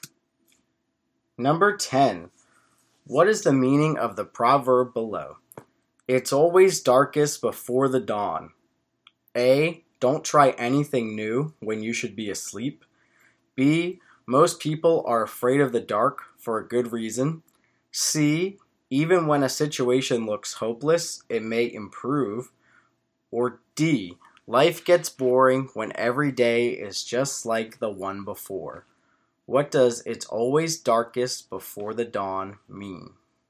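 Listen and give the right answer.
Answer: C: Even when a situation looks hopeless, it may improve.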